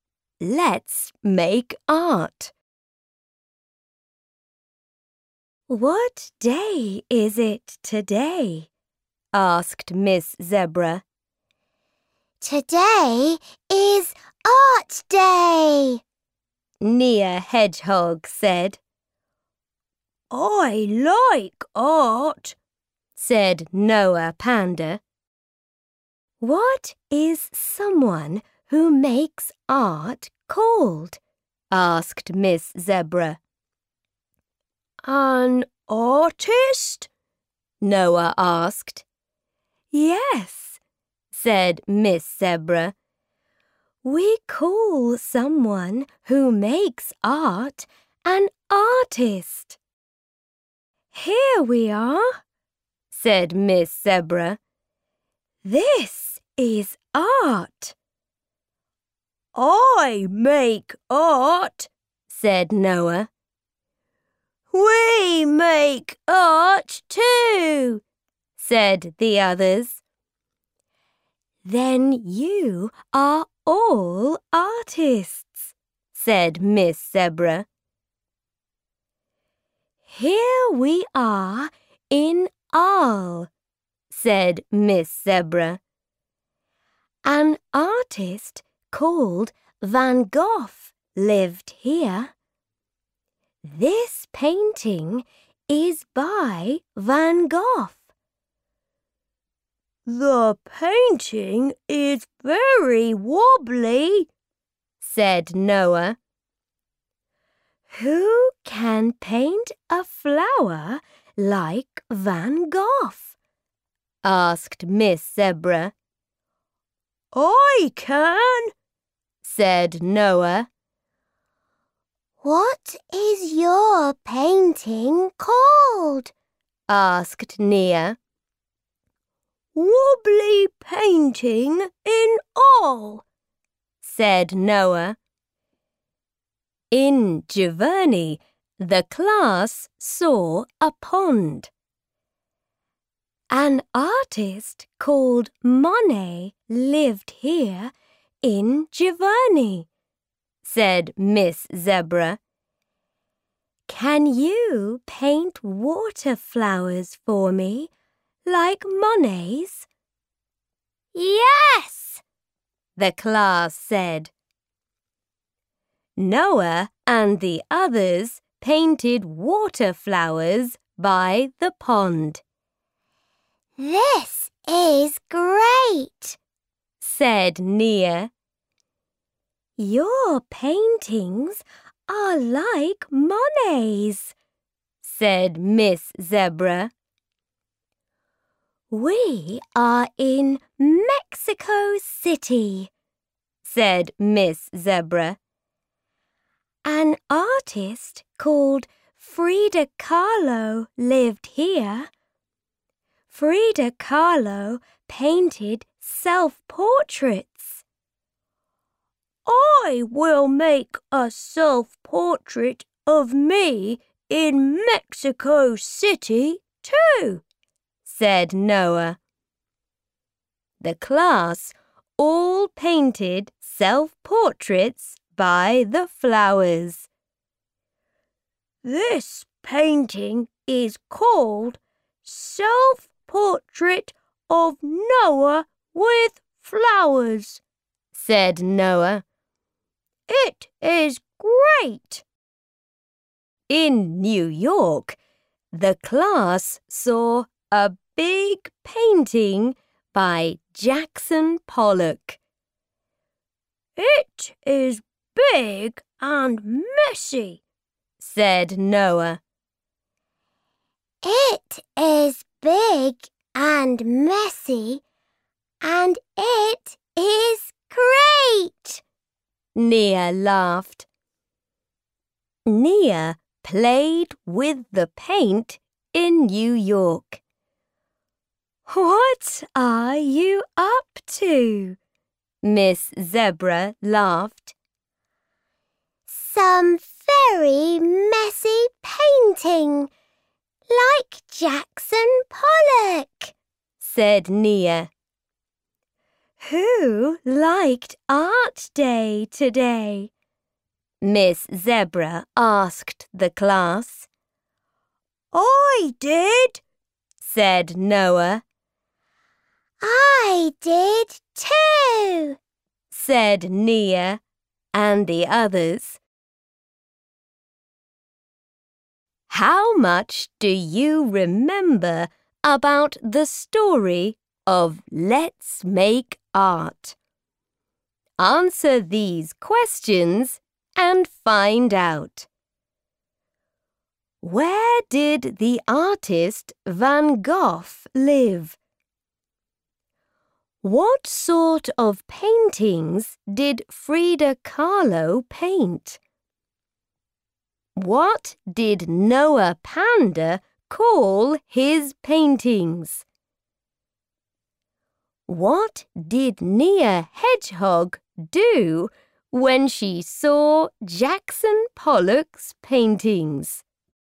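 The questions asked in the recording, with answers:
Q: Where did the artist Van Gogh live?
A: In Arles

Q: What sort of paintings did Frida Kahlo paint?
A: Self-portraits

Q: What did Nia Hedgehog do when she saw Jackson Pollock's paintings?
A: She played with the paint and did some very messy painting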